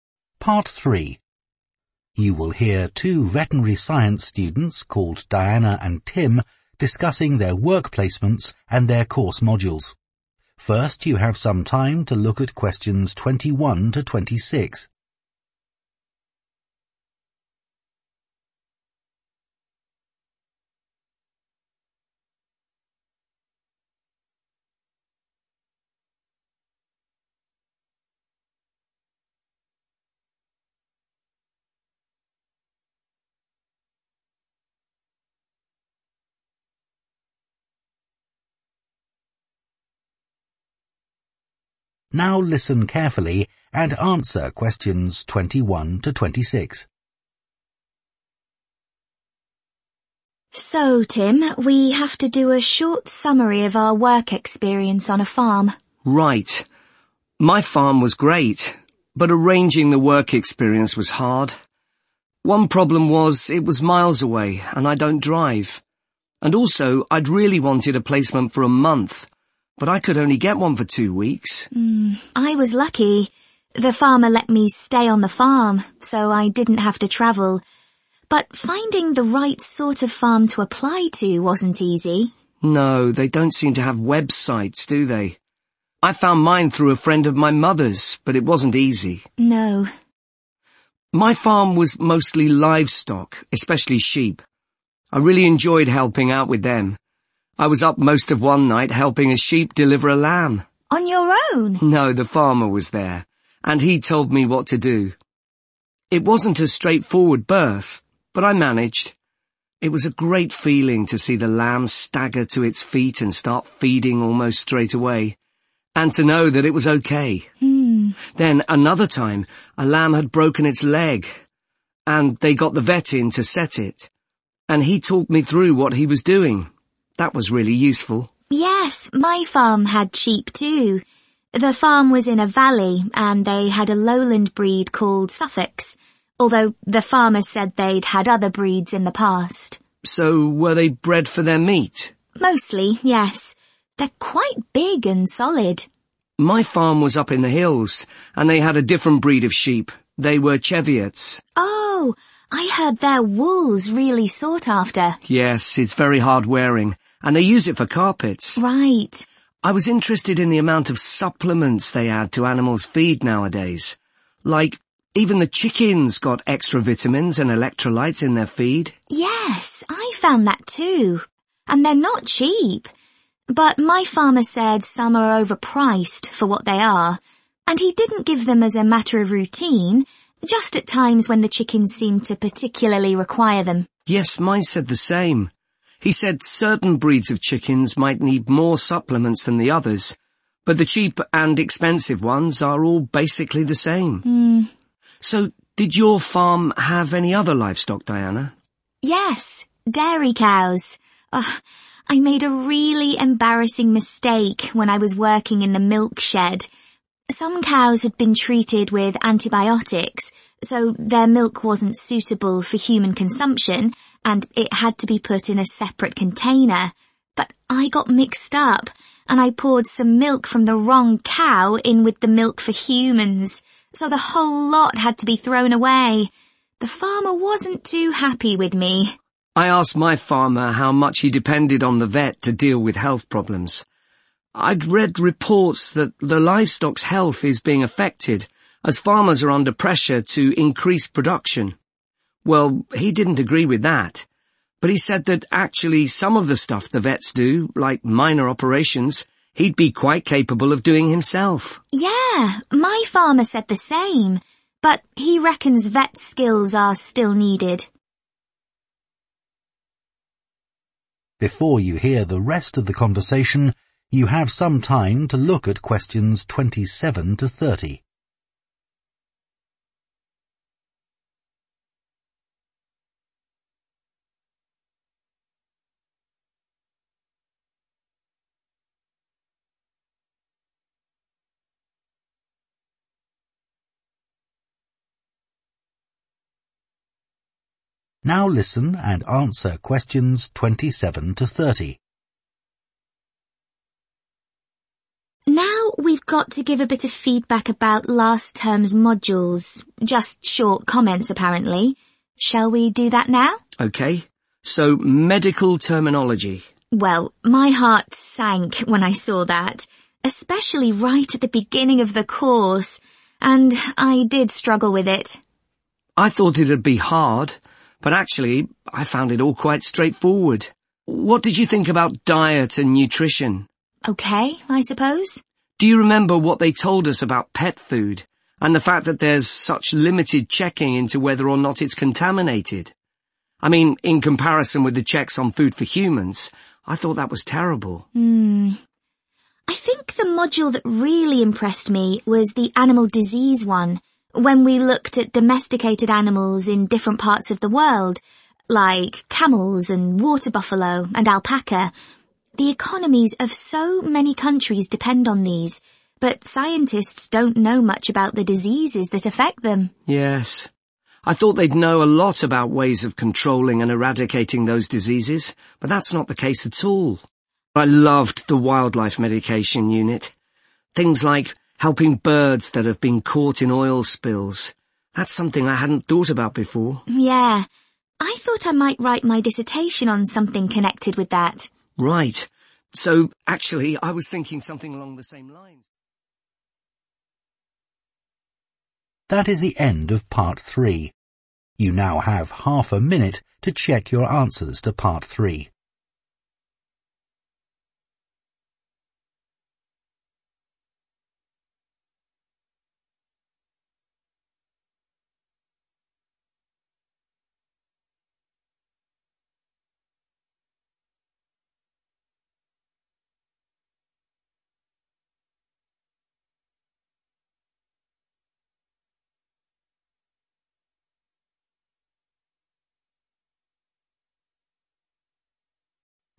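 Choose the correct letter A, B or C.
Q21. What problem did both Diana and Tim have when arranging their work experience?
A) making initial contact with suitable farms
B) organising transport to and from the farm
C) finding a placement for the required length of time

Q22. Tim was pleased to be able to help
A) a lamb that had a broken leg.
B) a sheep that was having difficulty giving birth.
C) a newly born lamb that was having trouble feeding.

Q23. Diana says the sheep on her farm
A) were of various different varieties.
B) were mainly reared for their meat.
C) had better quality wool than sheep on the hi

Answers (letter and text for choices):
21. A) making initial contact with suitable farms
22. B) a sheep that was having difficulty giving birth.
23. B) were mainly reared for their meat.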